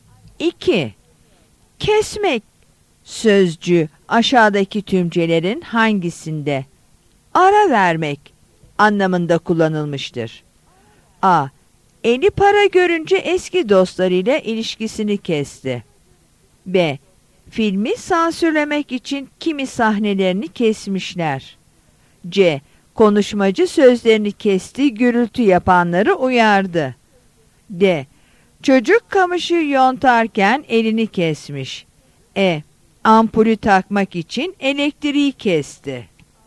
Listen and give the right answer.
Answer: Yanıt C'dir.